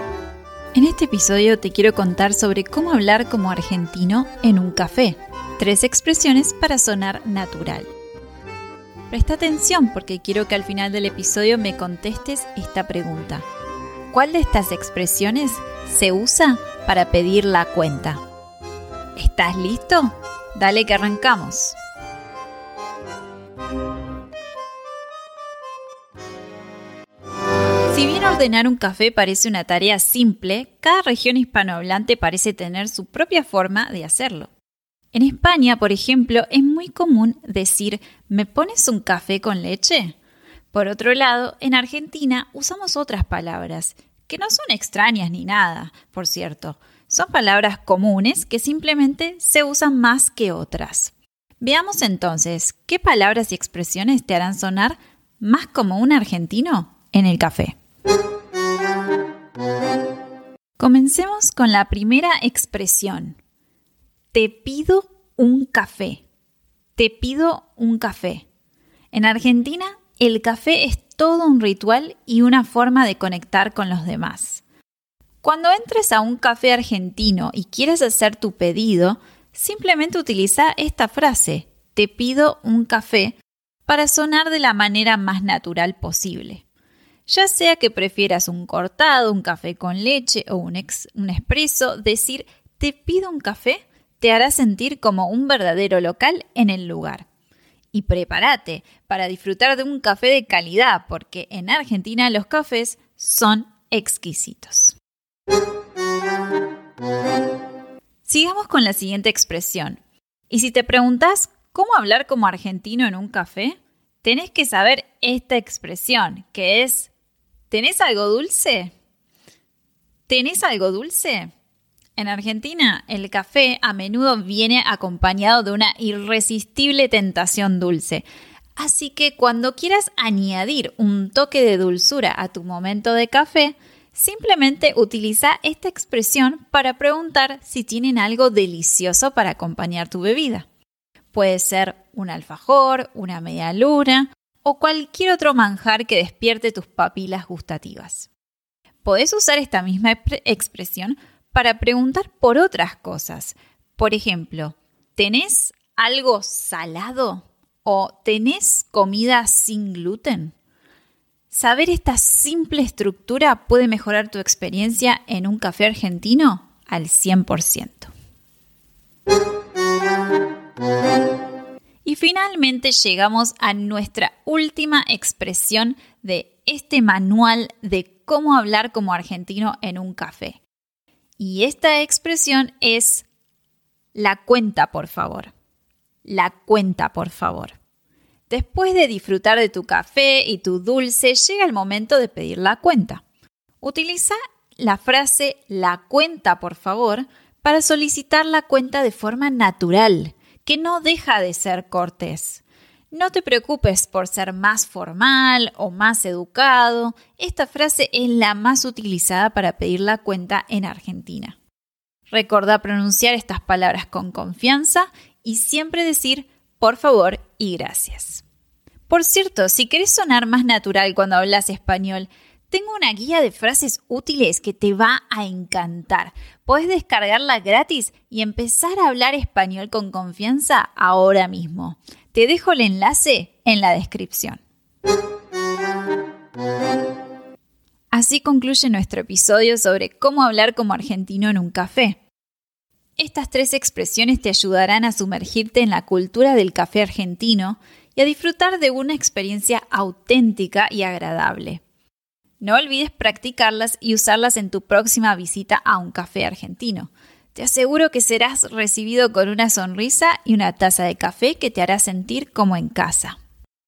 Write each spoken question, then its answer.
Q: ¿Cuál de estas expresiones se usa para pedir la cuenta?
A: la expresión que usamos para pedir la cuenta es la cuenta, por favor.